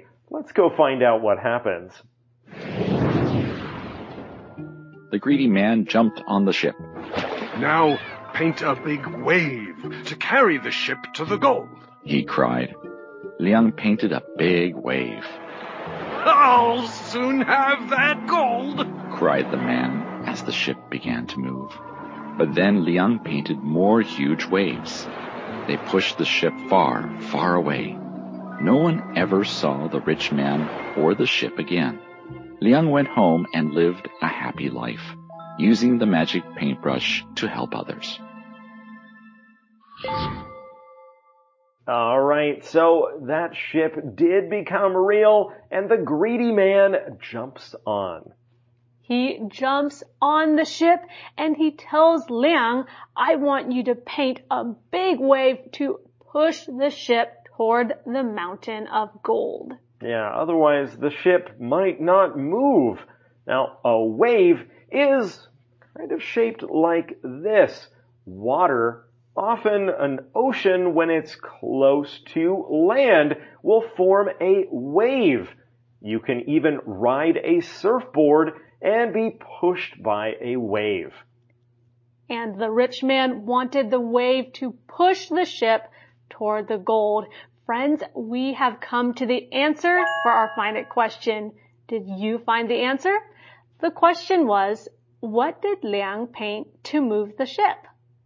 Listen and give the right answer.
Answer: He painted a big wave.